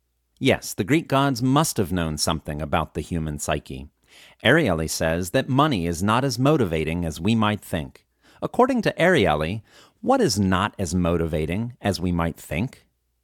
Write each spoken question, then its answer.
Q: According to Ariely, what is not as motivating as we might think?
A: According to Ariely, money is not as motivating as we might think.